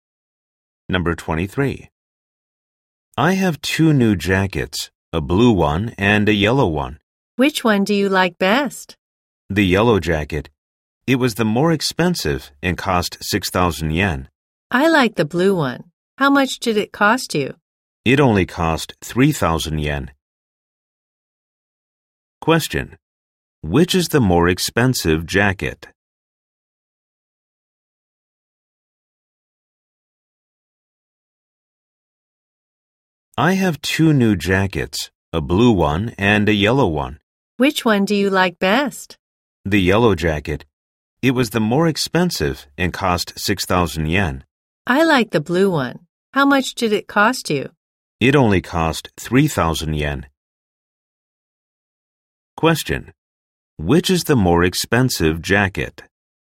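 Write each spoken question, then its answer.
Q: Which is the more expensive jacket?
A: The yellow one.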